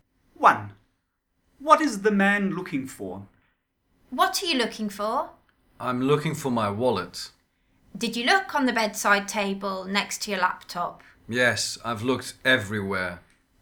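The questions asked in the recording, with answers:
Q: What is the man looking for?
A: His wallet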